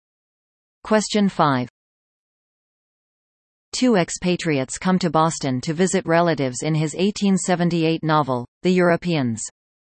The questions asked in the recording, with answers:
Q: Two expatriates come to Boston to visit relatives in his 1878 novel, The Europeans.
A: The answer is Henry James.